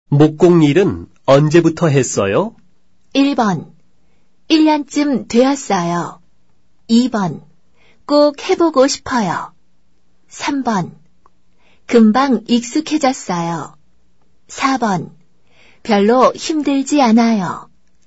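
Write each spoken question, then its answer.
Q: 목공 일은 언제부터 했어요?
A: 1: 1년쯤 되었어요.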